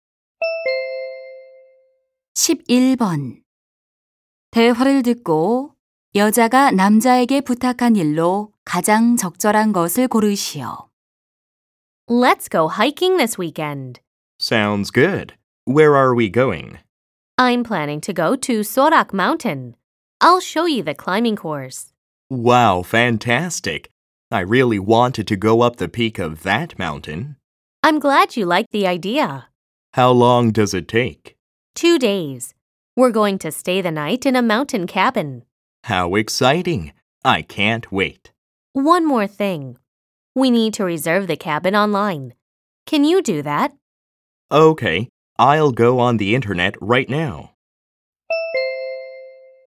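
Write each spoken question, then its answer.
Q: 대화를 듣고 여자가 남자에게 부탁한 일로 가장 적절한 것을 고르시오.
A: 산장 온라인 예약하기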